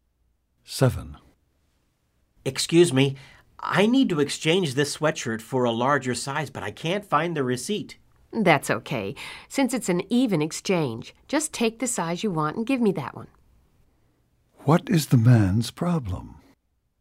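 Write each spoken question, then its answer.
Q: What is the man's problem?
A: He wants to exchange a sweatshirt for a larger size but can't find the receipt.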